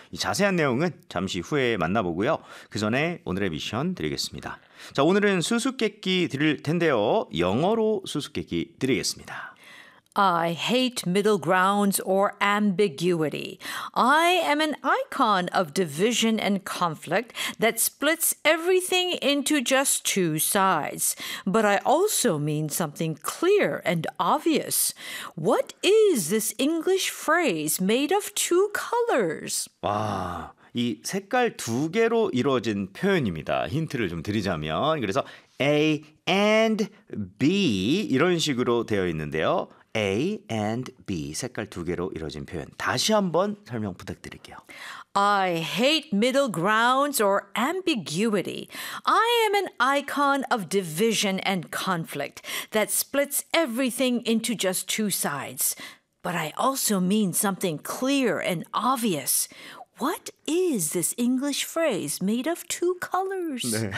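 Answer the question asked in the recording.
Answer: black and white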